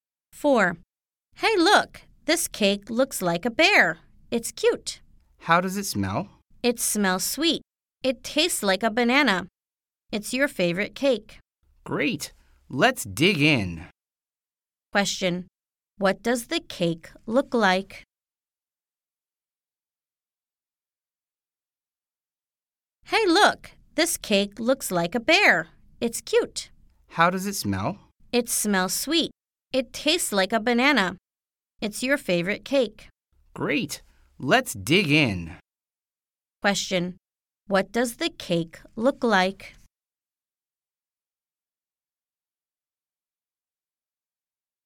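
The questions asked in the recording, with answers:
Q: Question. What does the cake look like?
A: A bear.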